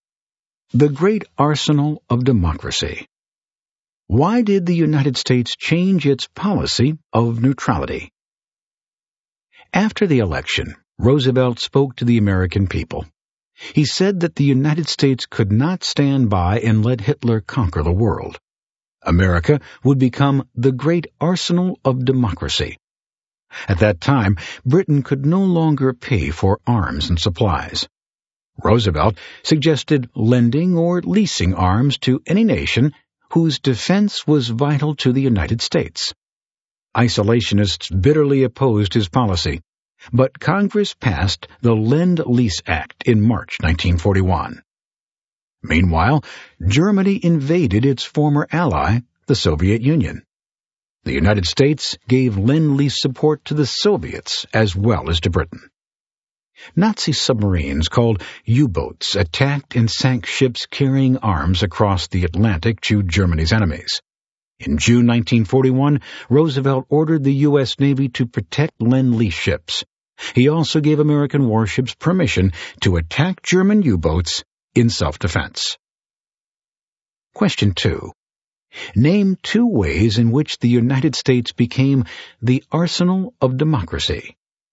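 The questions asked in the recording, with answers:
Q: Name two ways in which the United States became the arsenal of democracy.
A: The Lend-Lease Act lent or leased arms to Britain and the Soviet Union, and the U.S. Navy protected Lend-Lease ships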